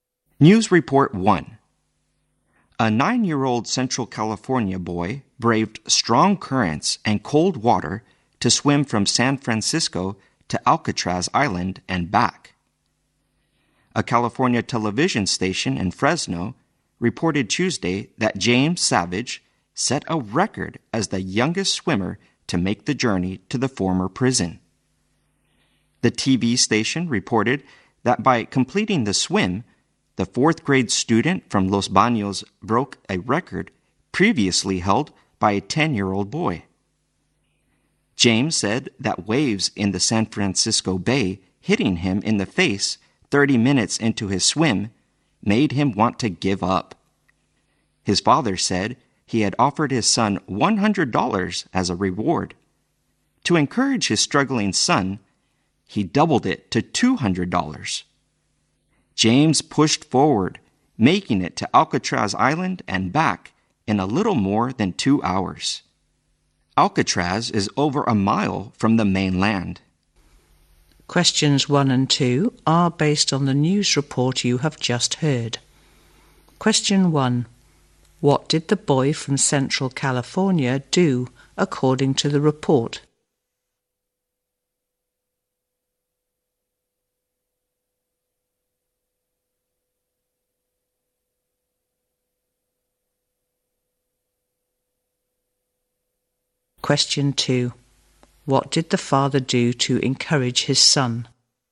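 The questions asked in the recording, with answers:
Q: What did the boy from Central California do according to the report?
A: He swam from San Francisco to Alcatraz Island and back, setting a record as the youngest swimmer to do so.

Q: What did the father do to encourage his son?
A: He doubled the reward from $100 to $200.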